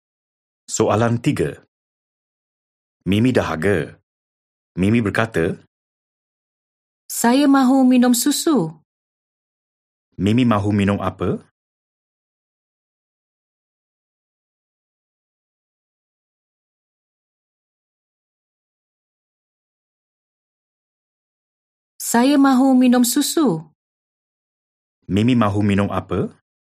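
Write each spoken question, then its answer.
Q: Mimi mahu minum apa?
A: susu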